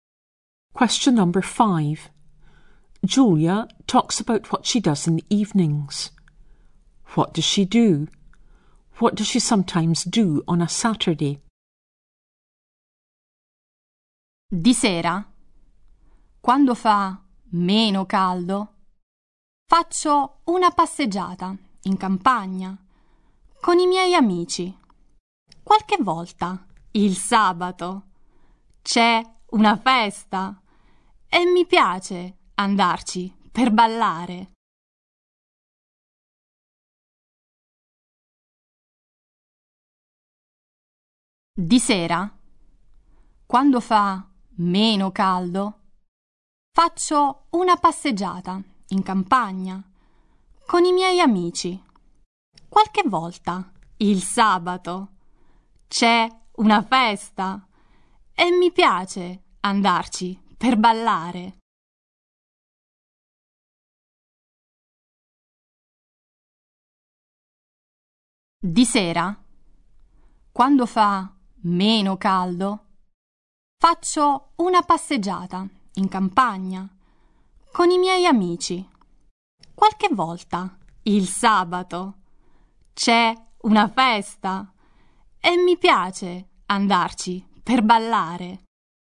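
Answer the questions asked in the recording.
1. She goes for a walk in the countryside with friends
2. Goes to a party to dance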